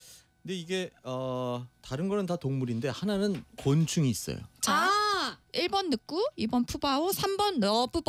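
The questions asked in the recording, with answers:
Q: 근데 이게 다른 거는 다 동물인데 하나는 곤충이 있어요.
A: 3: 러브버그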